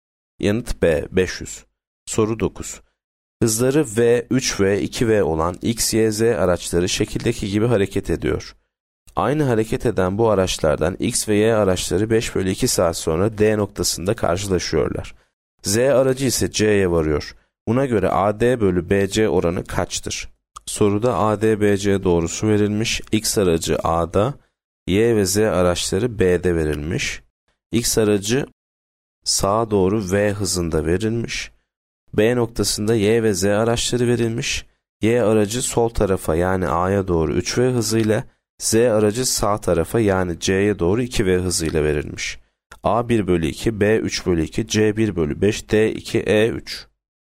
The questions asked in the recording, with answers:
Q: Buna göre AD bölü BC oranı kaçtır?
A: Yanıt A 1 bölü 2.